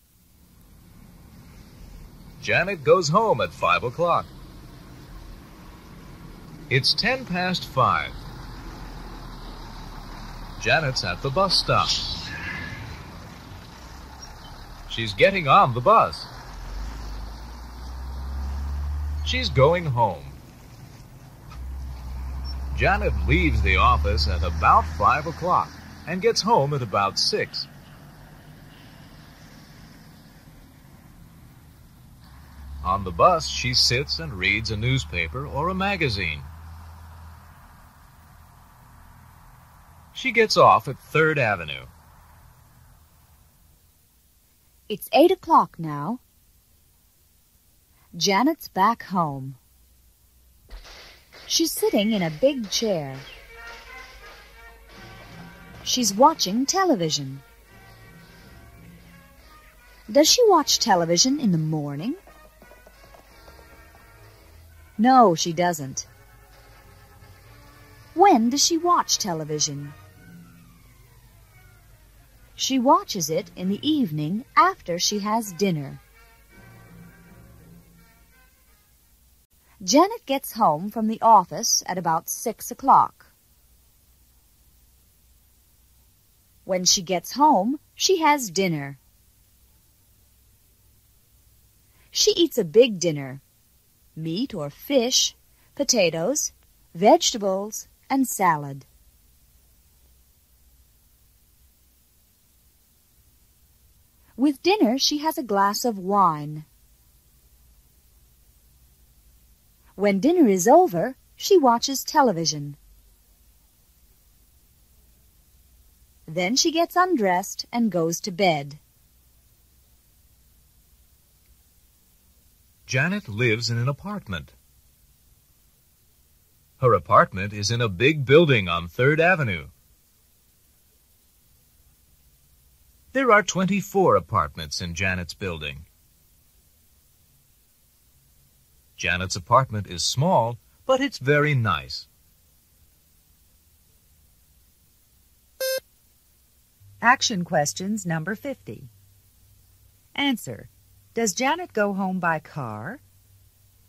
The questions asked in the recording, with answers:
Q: Does Janet go home by car?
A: No, she doesn't.